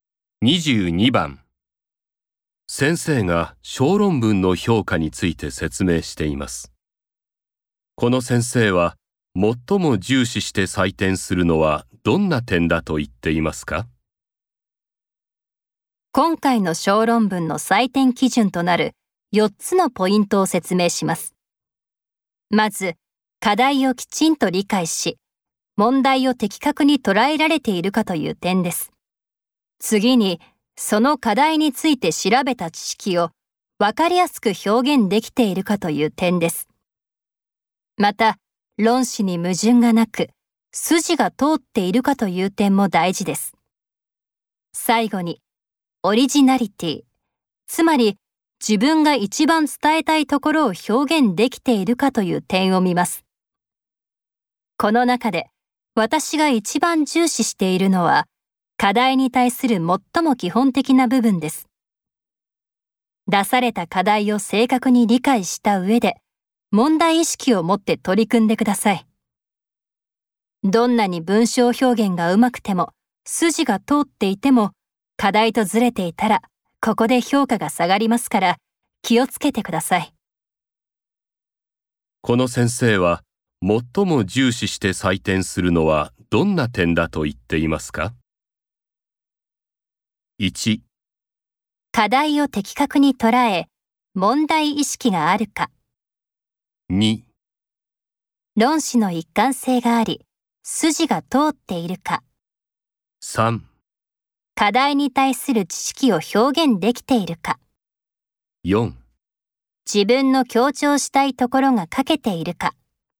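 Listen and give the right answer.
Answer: 1: 課題を的確に捉え、問題意識があるか。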